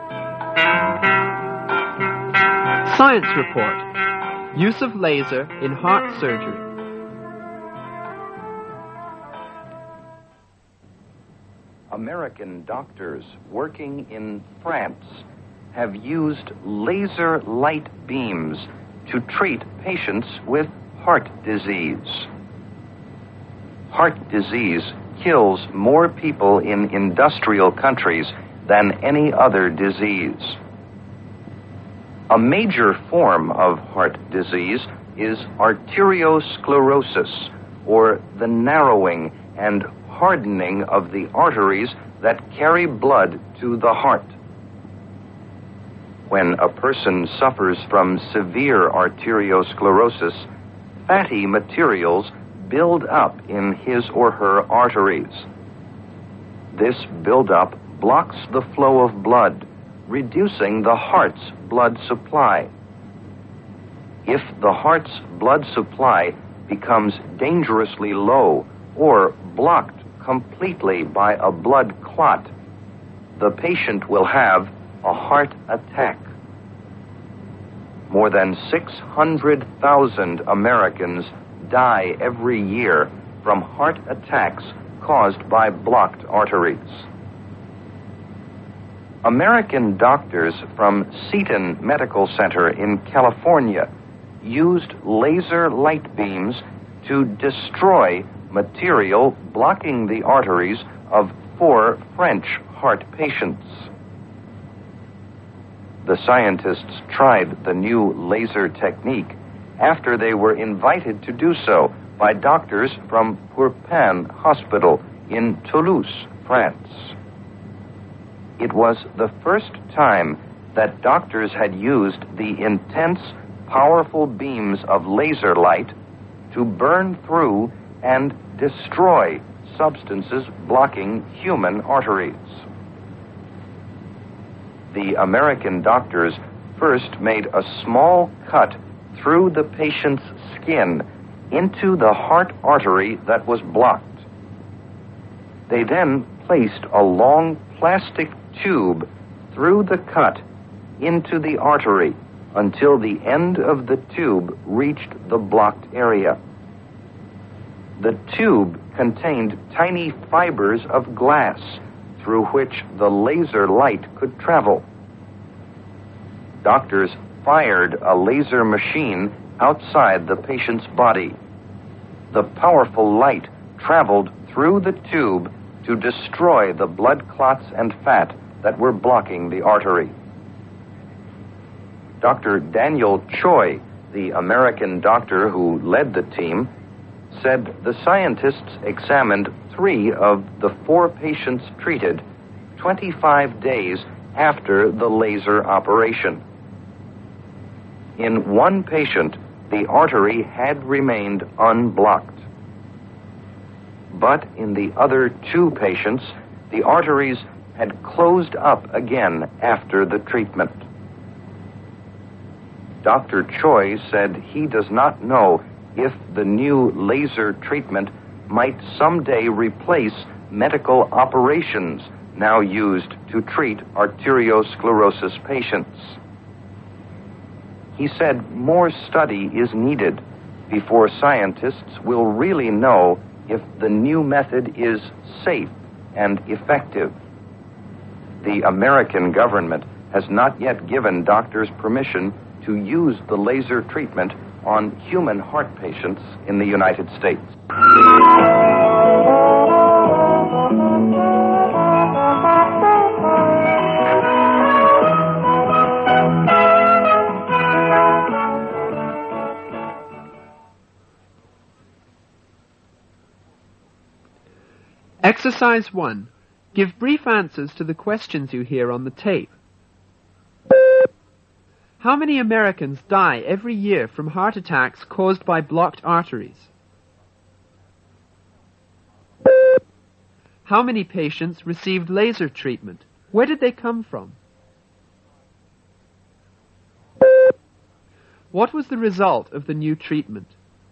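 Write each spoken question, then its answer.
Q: How many Americans die every year from heart attacks caused by blocked arteries?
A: More than 600,000

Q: How many patients received laser treatment?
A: Four

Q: Where did they come from?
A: France

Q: What was the result of the new treatment?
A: Of three patients examined 25 days later, one artery stayed unblocked; in two the arteries closed up again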